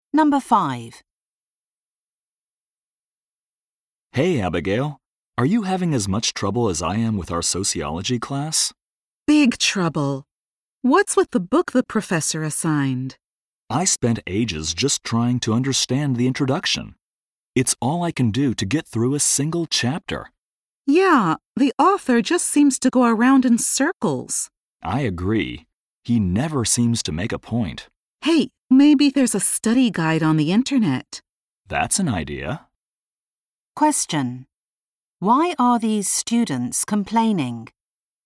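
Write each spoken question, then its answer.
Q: Why are these students complaining?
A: The assigned book is hard to understand.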